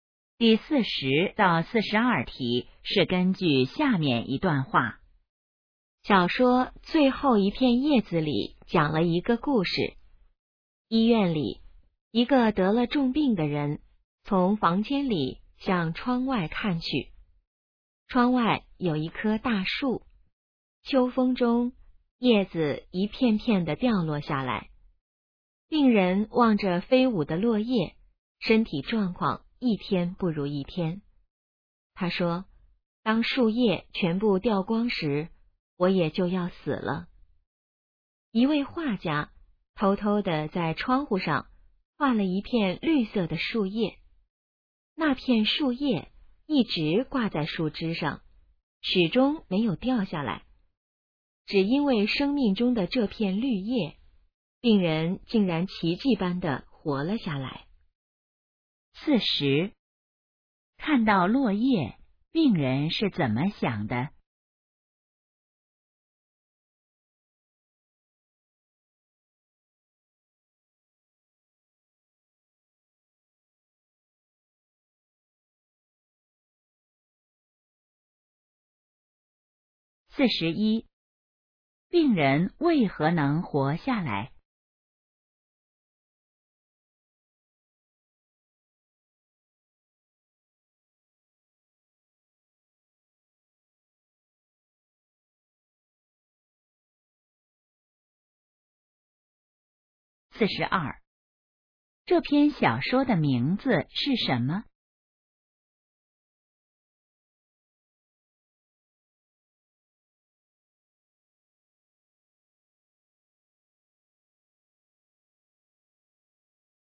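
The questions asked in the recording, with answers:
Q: 看到落叶,病人是怎么想的?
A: 树叶掉光时自己就要死了

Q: 病人为何能活下来?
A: 画家画的那片绿叶一直没有掉

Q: 这篇小说的名字是什么?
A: 最后一片叶子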